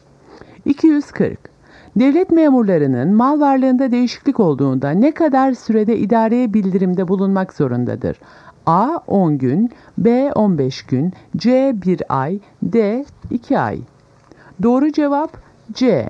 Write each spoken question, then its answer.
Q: Devlet memurlarının mal varlığında değişiklik olduğunda ne kadar sürede idareye bildirimde bulunmak zorundadır?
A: Doğru cevap C. 1 ay.